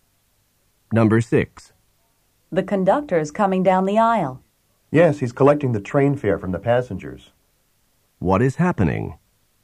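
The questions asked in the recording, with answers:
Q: What is happening?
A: The conductor is collecting train fares.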